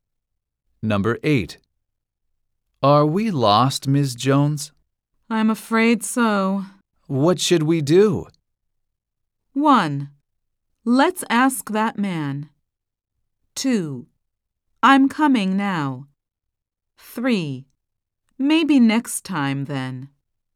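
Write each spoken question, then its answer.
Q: What should we do?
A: 1: Let's ask that man.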